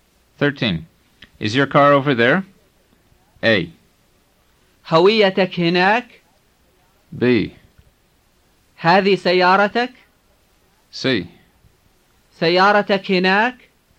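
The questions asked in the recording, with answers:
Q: Is your car over there?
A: C: سيارتك هناك؟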